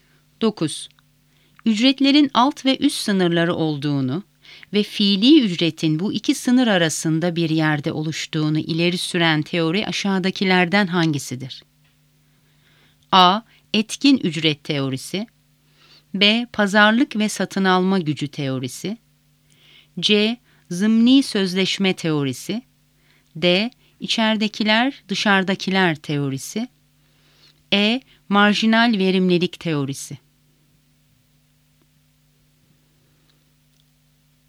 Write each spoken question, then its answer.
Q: Ücretlerin alt ve üst sınırları olduğunu ve fiili ücretin bu iki sınır arasında bir yerde oluştuğunu ileri süren teori aşağıdakilerden hangisidir?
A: Doğru cevap B. Pazarlık ve satın alma gücü teorisi.